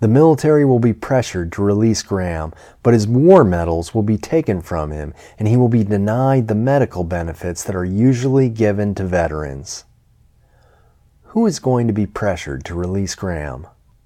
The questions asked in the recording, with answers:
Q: Who is going to be pressured to release Graham?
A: The military is going to be pressured to release Graham.